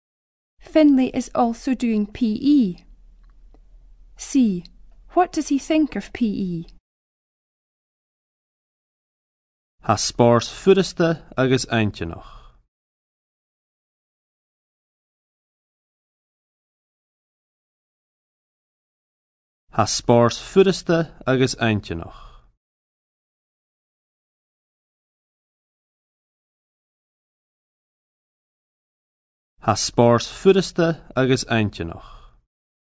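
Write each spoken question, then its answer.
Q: What does he think of PE?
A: Easy and interesting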